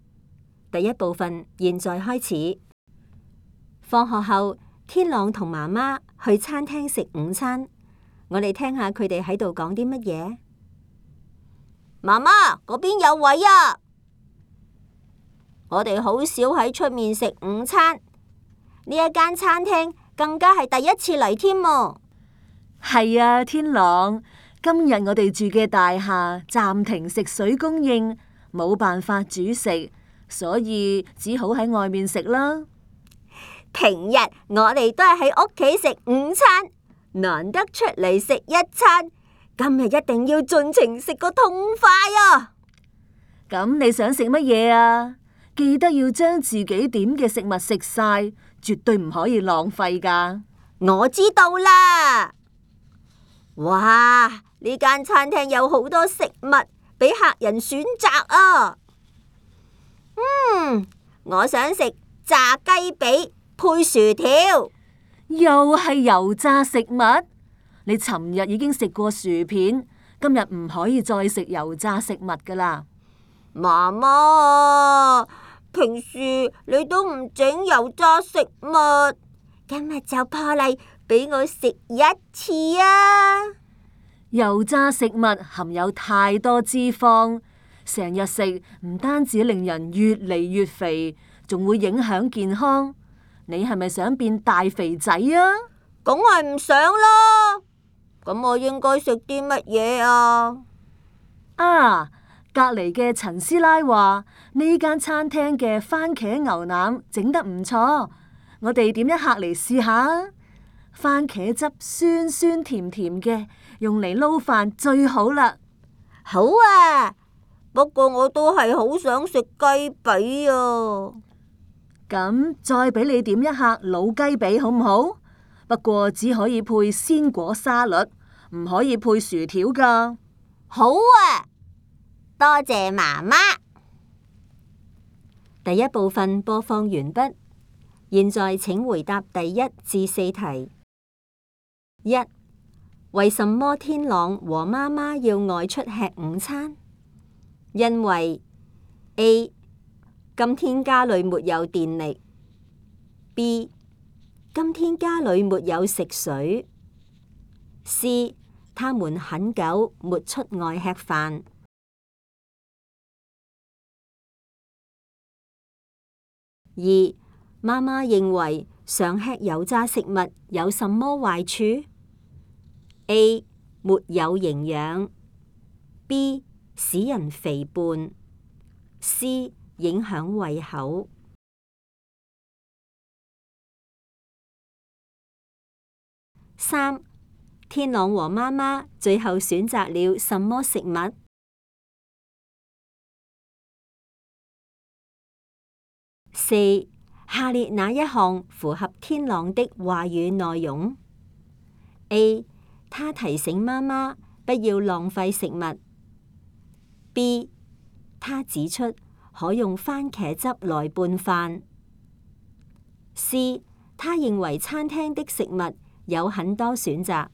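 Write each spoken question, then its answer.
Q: 为什么天朗和妈妈要外出吃午餐?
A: B:今天家里没有食水。

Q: 妈妈认为常吃油炸食物有什么坏处?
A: B:使人肥胖。

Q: 天朗和妈妈最后选择了什么食物?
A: 番茄牛腩和鸡髀配鲜果沙律

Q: 下列哪一项符合天朗的话语内容?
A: C:他认为餐厅的食物有很多选择。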